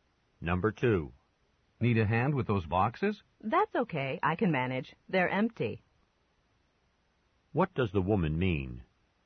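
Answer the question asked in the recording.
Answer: She doesn't need help because the boxes are empty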